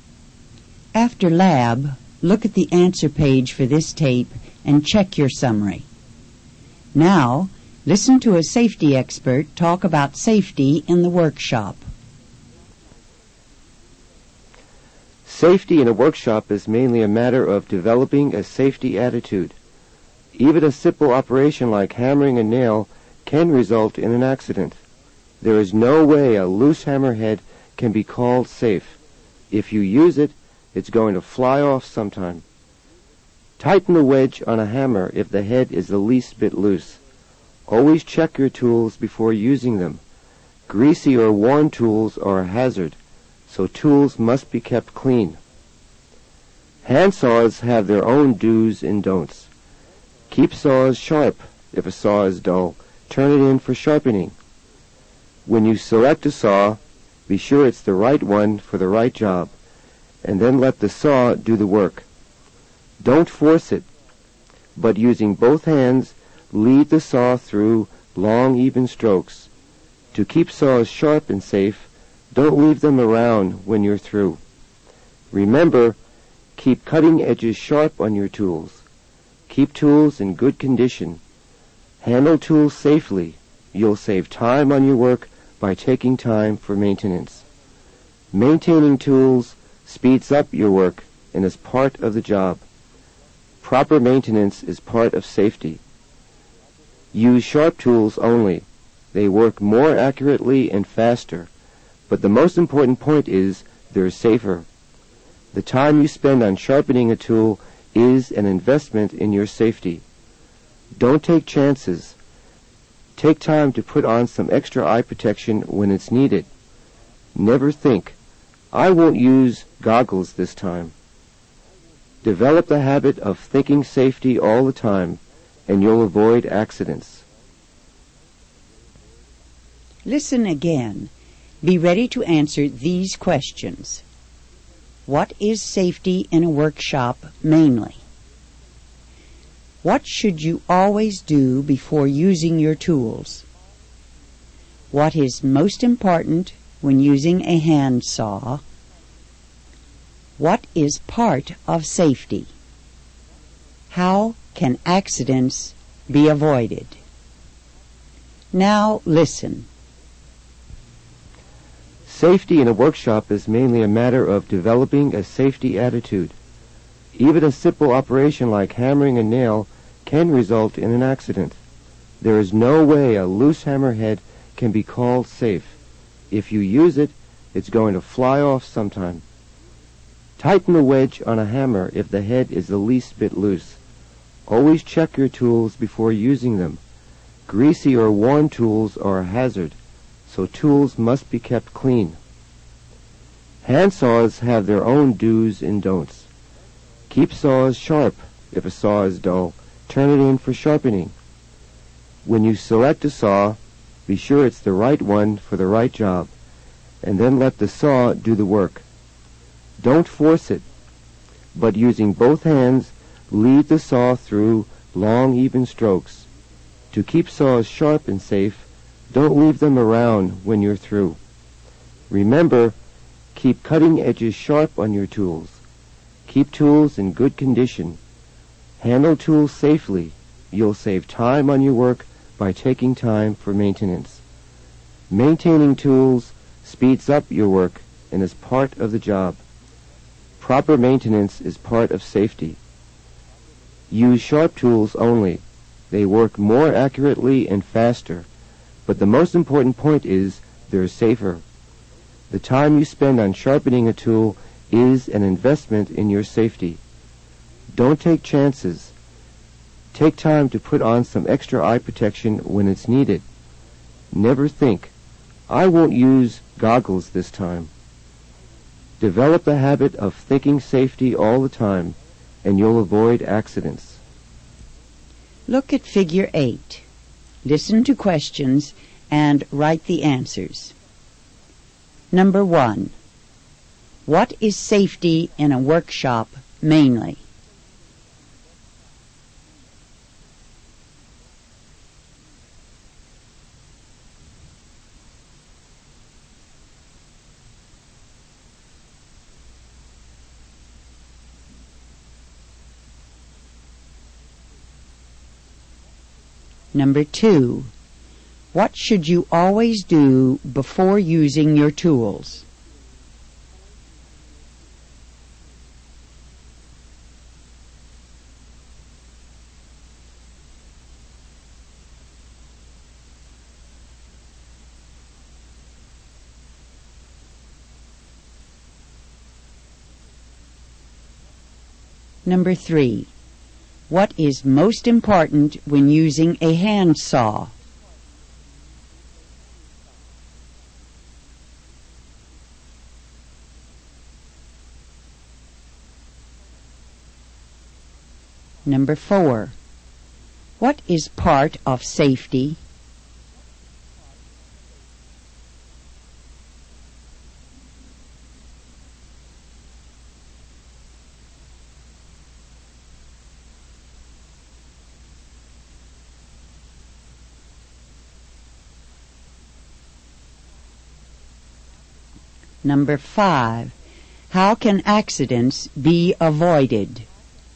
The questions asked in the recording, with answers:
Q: What is safety in a workshop mainly?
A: A matter of developing a safety attitude.

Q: what should you always do before using your tools?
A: Always check them before using them.

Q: what is most important when using a handsaw?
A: Keep it sharp.

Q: what is part of safety?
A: Proper maintenance is part of safety.

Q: how can accidents be avoided?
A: By developing the habit of thinking safety all the time.